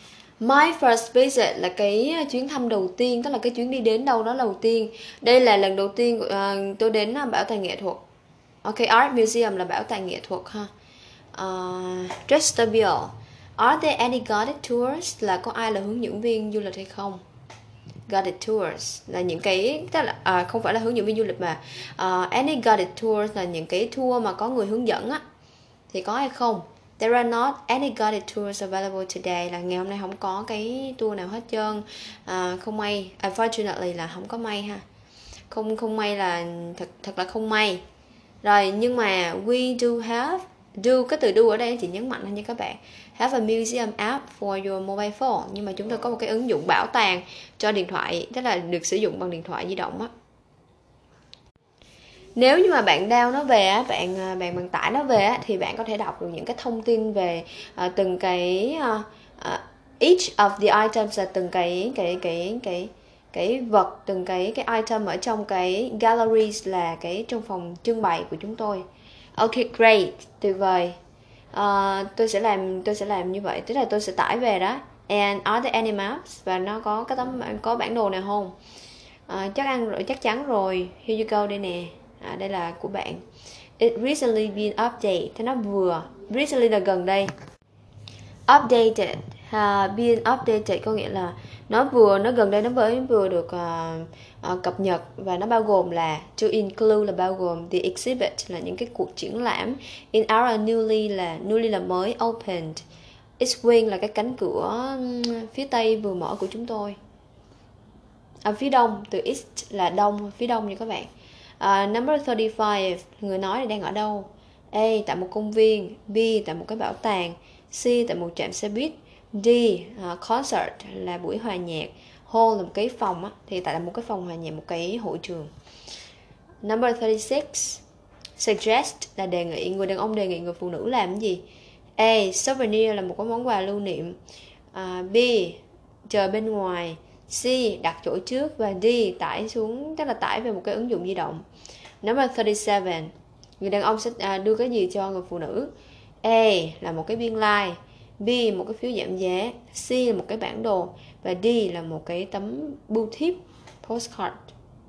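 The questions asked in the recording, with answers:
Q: người nói là đang ở đâu?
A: B: Tại một cái bảo tàng

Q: Suggest là đề nghị, người đàn ông đề nghị người phụ nữ làm cái gì?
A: D: Tải xuống một cái ứng dụng di động

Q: người đàn ông sẽ đưa cái gì cho người phụ nữ?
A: C: Một cái bản đồ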